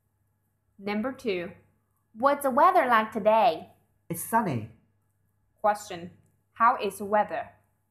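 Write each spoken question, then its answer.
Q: How is the weather?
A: It's sunny.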